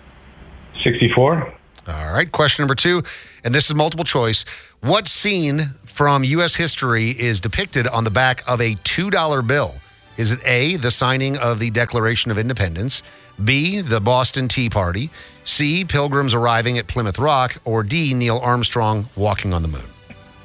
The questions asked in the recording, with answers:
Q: What scene from U.S. history is depicted on the back of a $2 bill?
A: It's A, signing the Declaration of Independence.